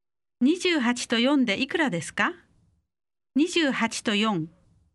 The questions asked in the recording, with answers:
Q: 28と4でいくらですか28と4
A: 32 32